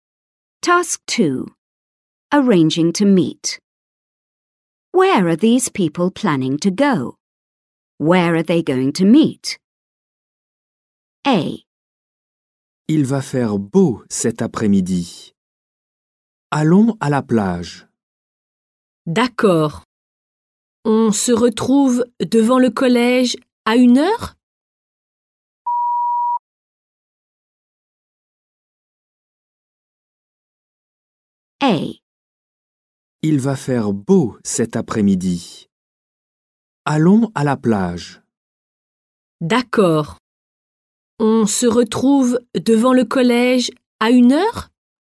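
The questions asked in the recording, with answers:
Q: Where are these people planning to go?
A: To the beach

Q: Where are they going to meet?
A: In front of the school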